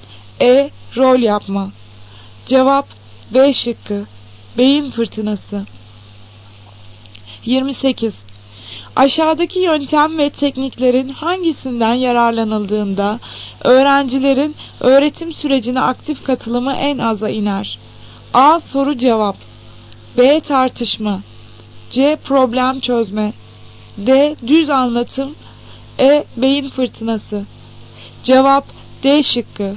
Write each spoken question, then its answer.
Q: Aşağıdaki yöntem ve tekniklerin hangisinden yararlanıldığında öğrencilerin öğretim sürecine aktif katılımı en aza iner.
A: Cevap D şıkkı. Düz anlatım.